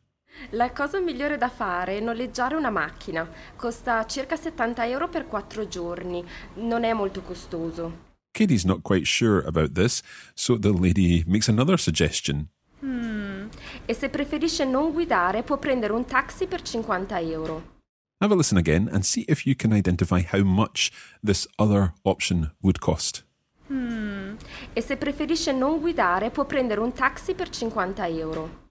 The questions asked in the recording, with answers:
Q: Have a listen again and see if you can identify how much this other option would cost.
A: You can take a taxi for 50 euros.